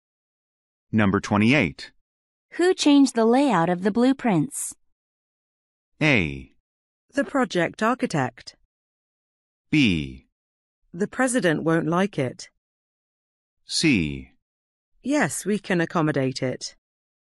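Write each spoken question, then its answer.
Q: Who changed the layout of the blueprints?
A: A: The project architect.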